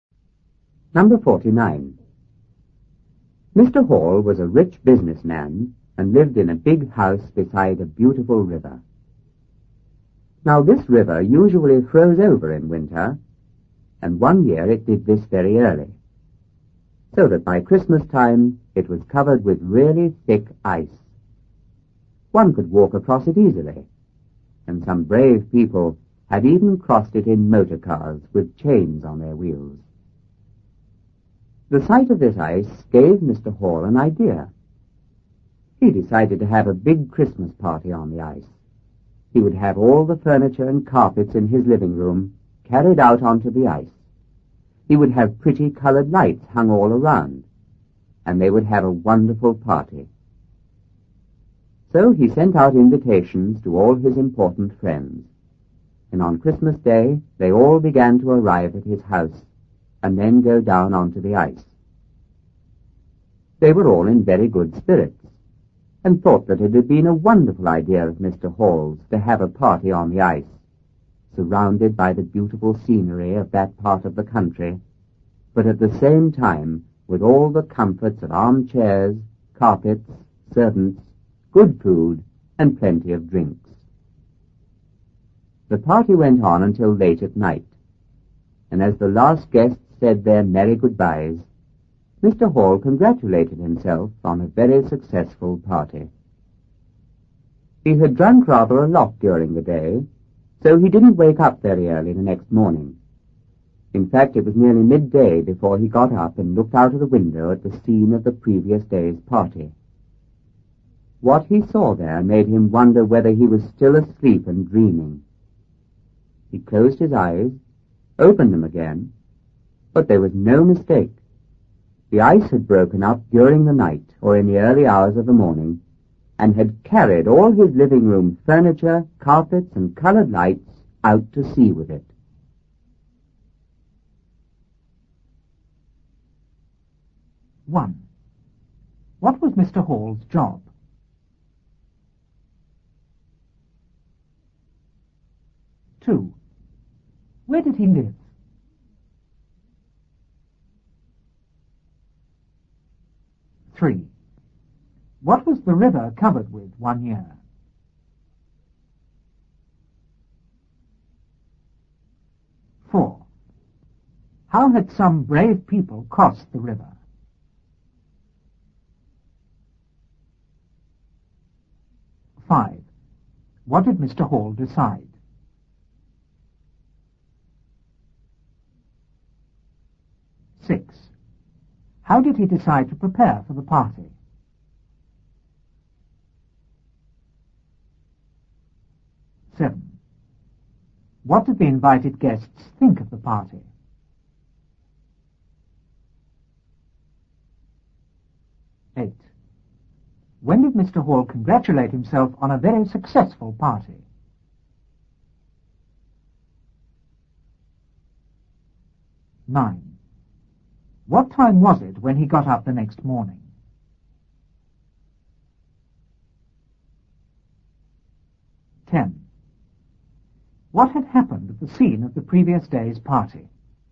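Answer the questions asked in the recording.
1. He was a rich businessman.
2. In a big house beside a beautiful river.
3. Really thick ice.
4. In motor cars with chains on their wheels.
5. To have a big Christmas party on the ice.
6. He had his living room furniture and carpets carried onto the ice and colored lights hung all around.
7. They thought it was a wonderful idea.
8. Late at night, as the last guests said goodbye.
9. Nearly midday.
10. The ice had broken up and carried his furniture, carpets and lights out to sea.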